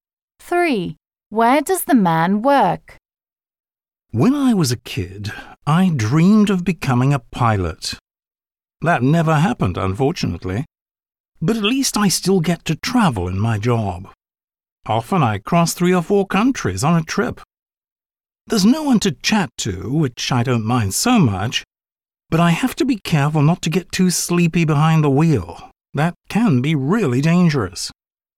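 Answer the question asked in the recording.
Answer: In a truck (he is a long-distance driver)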